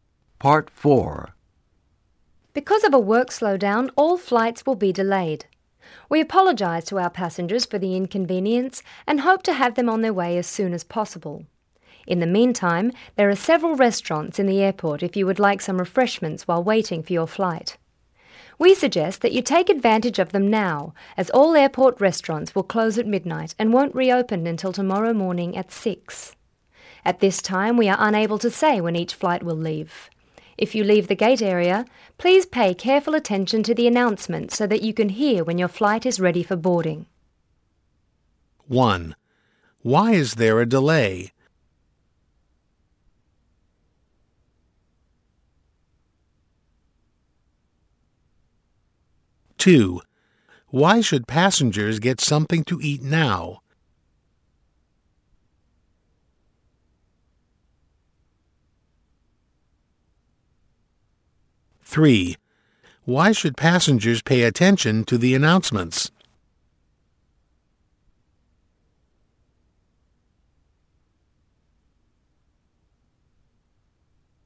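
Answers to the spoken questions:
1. Because of a work slowdown.
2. The restaurants will close at midnight.
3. To hear when their flight is ready for boarding.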